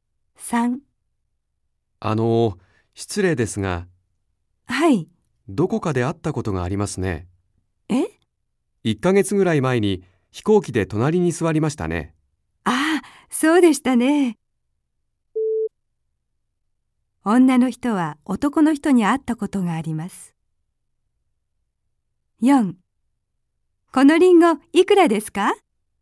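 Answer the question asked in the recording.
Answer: ○(正しい)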